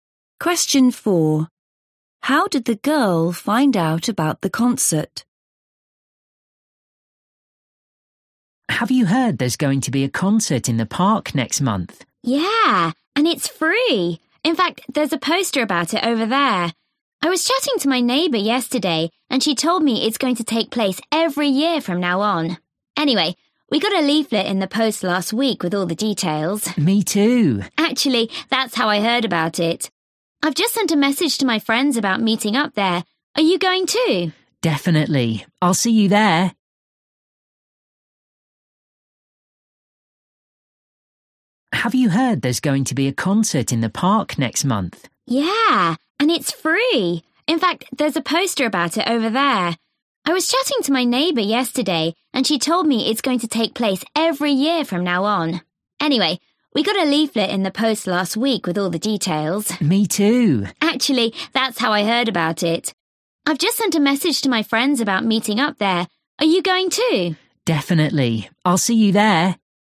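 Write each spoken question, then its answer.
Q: How did the girl find out about the concert?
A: From a leaflet in the post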